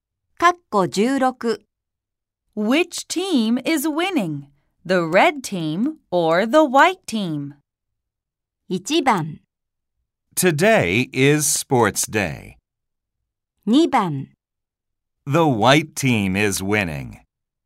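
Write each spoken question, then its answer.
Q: Which team is winning? The red team or the white team?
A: 2: The white team is winning.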